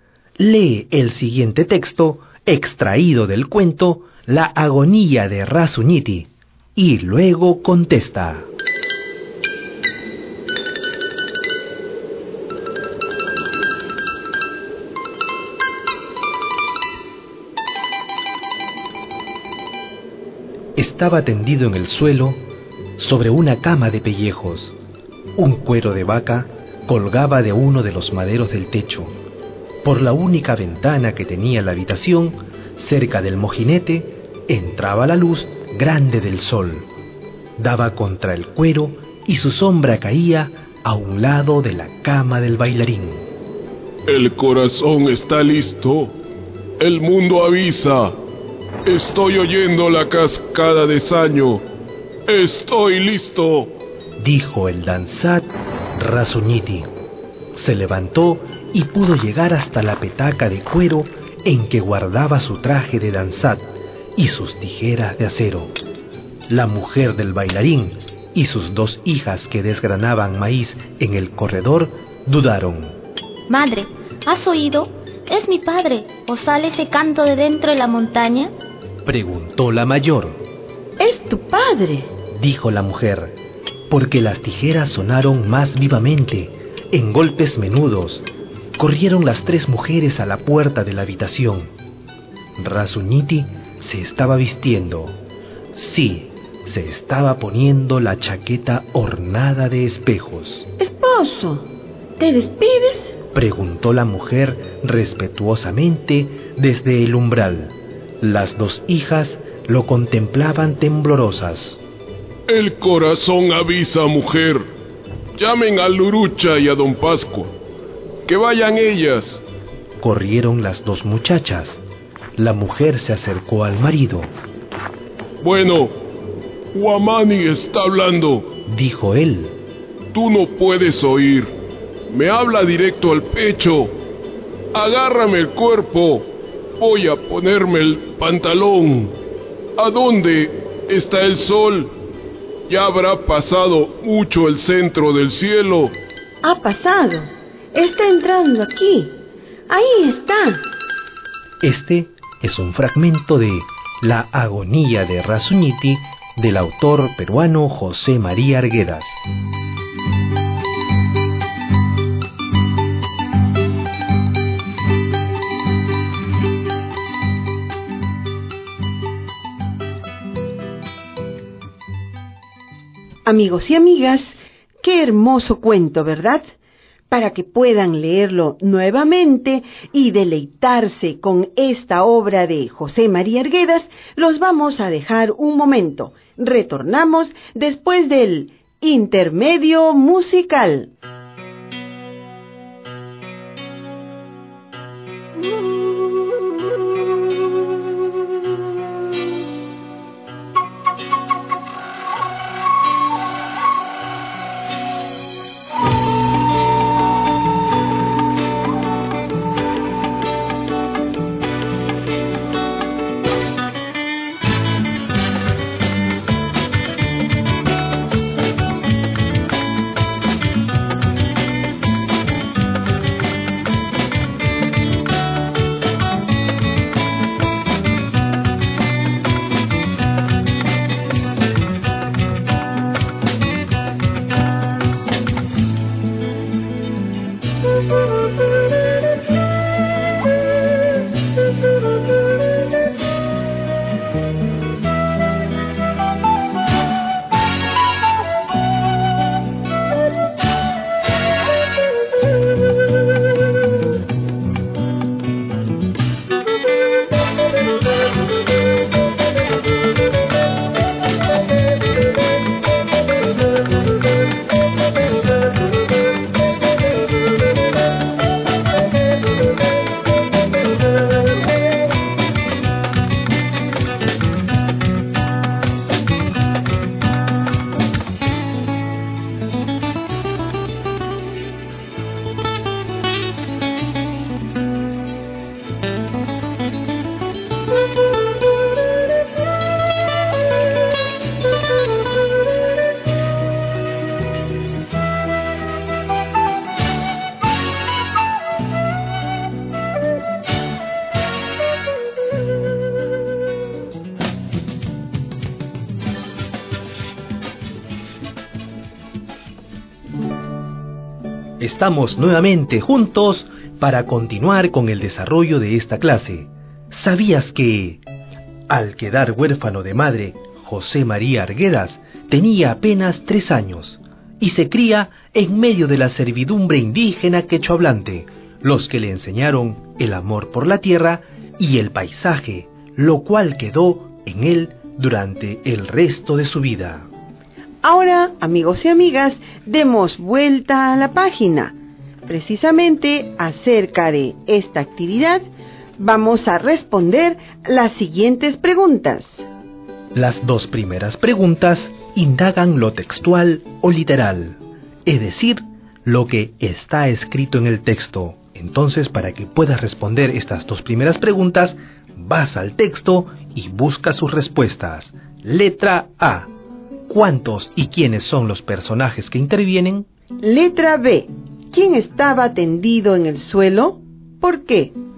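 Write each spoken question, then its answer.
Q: ¿Quién estaba tendido en el suelo?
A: El danzak (bailarín) Rasuñiti, porque estaba agonizando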